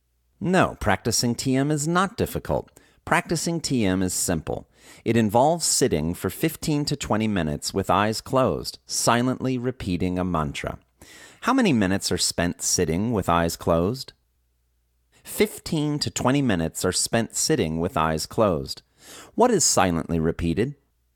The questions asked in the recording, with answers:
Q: What is silently repeated?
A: A mantra is silently repeated.